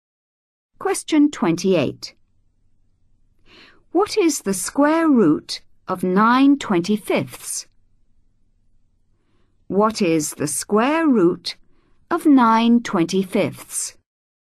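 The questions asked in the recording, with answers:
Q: What is the square root of 9/25?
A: 3/5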